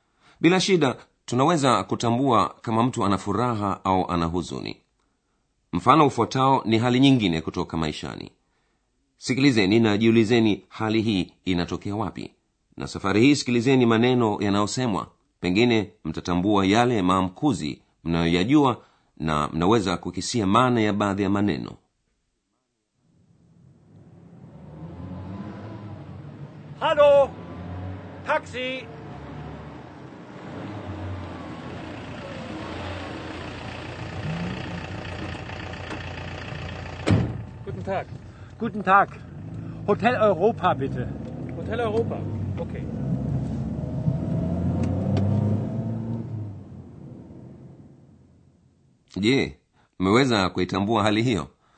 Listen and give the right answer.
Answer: Bwana mmoja yuko kandoni mwa njia, anaita taksi ikiwa na maana ile ile Kijerumani, na anamwambia dereva anataka kwenda hotelini.